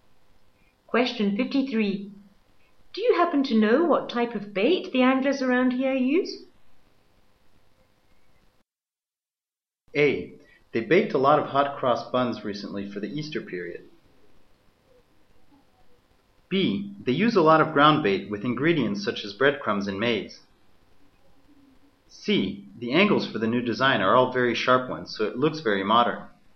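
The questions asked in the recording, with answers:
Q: Do you happen to know what type of bait the anglers around here use?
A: B: They use a lot of ground bait with ingredients such as breadcrumbs and maize.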